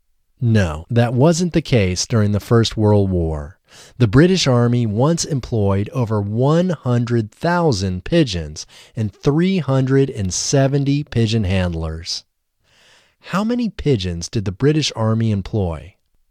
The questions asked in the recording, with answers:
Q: How many pigeons did the British Army employ?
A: The British Army employed over 100,000 pigeons.